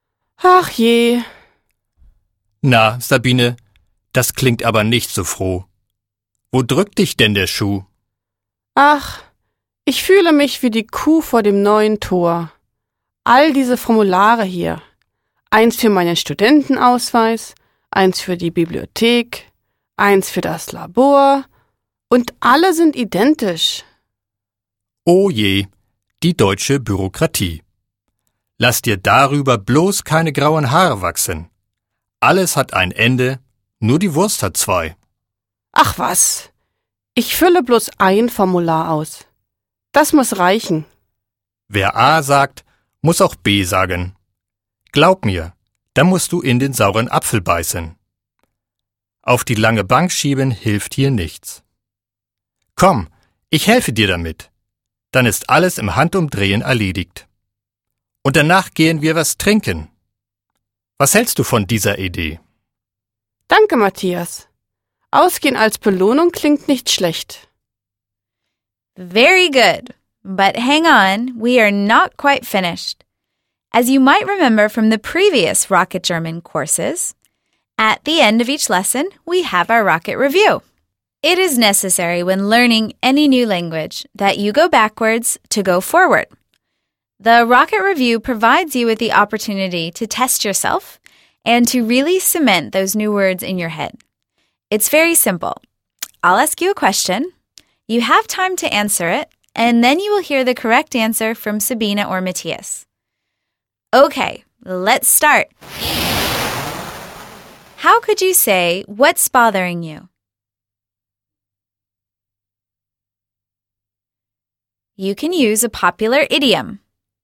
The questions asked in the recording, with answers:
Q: How could you say, what's bothering you? You can use a popular idiom.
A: Wo drückt dich denn der Schuh?